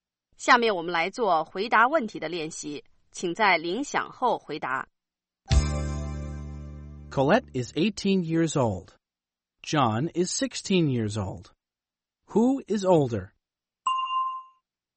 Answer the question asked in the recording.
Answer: Colette is. Colette is older than John.